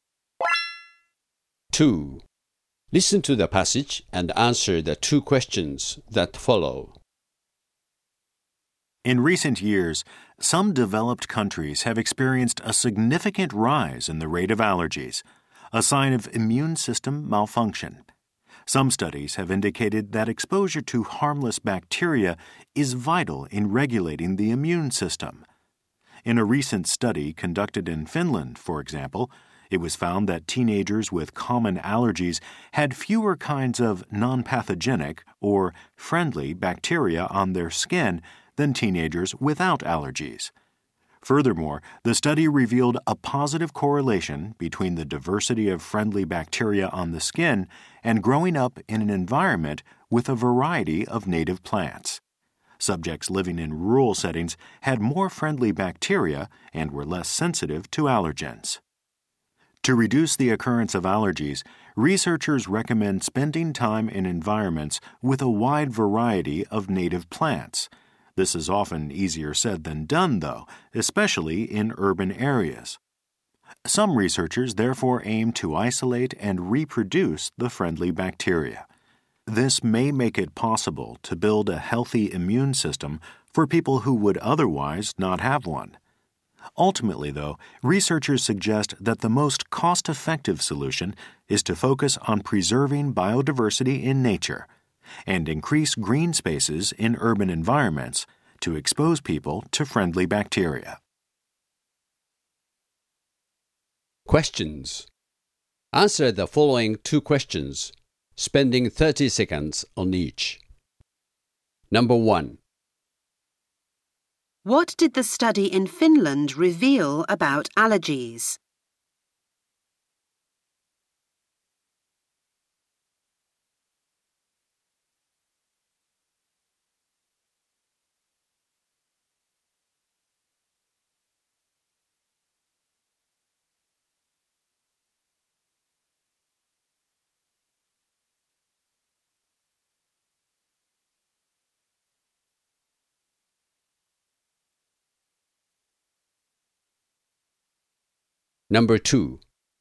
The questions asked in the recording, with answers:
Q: What did the study in Finland reveal about allergies?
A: The study showed that teenagers suffering from common allergies had fewer kinds of non pathogenic or friendly bacteria on their skin than other teenagers who were allergy free.